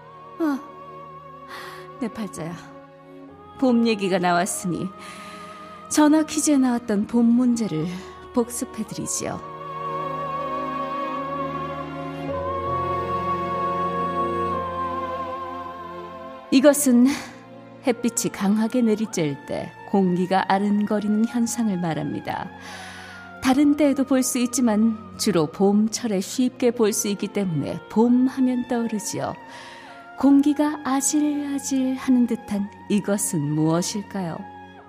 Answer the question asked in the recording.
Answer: 정답 아지랑이